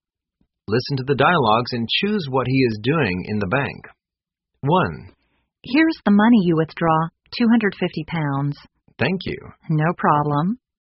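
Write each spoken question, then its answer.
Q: Listen to the dialogues and choose what he is doing in the bank.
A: Withdrawing money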